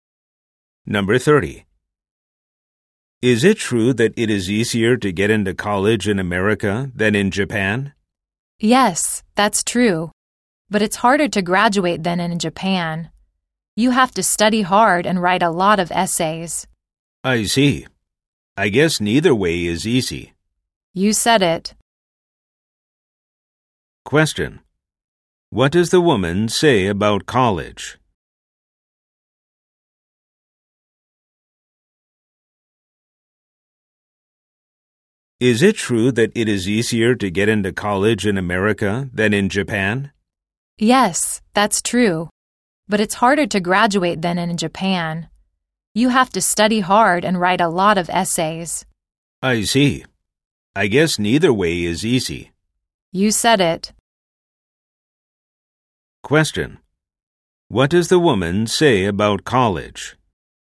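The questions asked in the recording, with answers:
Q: What does the woman say about college?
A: In America it is easier to get into college but harder to graduate than in Japan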